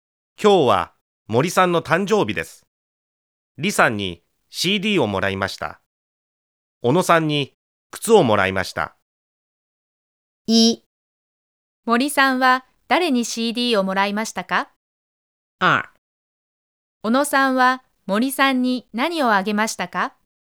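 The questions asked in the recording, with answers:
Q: 森さんは誰に CD をもらいましたか?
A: 李さん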